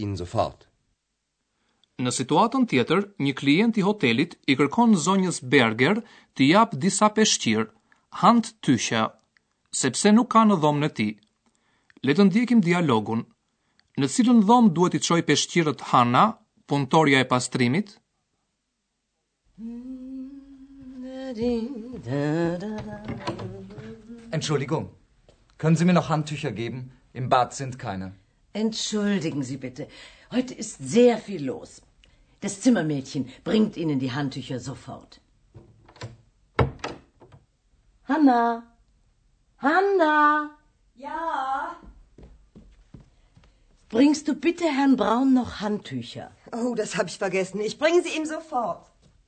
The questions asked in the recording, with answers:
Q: Le të ndjekim dialogun në cilën dhomë duhet i qoj peshqirët Hana, punëtorja e pastrimit?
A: Hanna duhet i çoj peshqirët në dhomën e Zotit Braun.